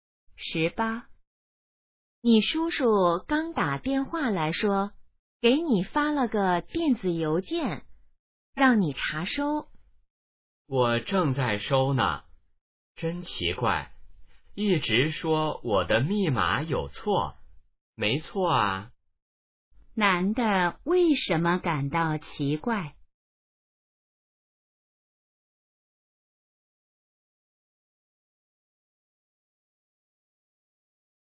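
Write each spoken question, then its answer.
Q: 男的为什么感到奇怪?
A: 一直说他的密码有错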